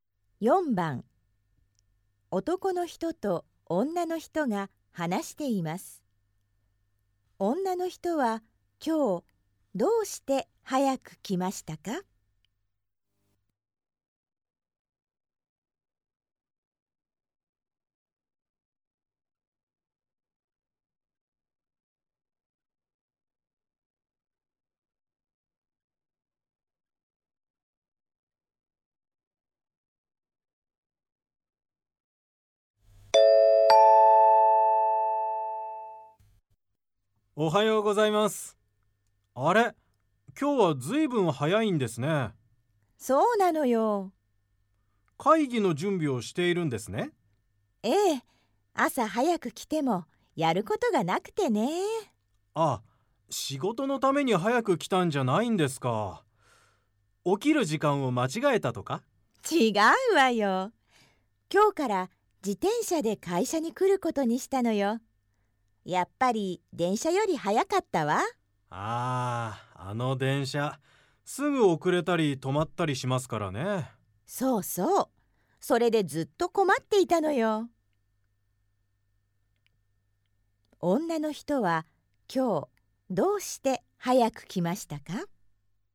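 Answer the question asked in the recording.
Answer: 自転車で会社に来ることにして、電車より早く着いたから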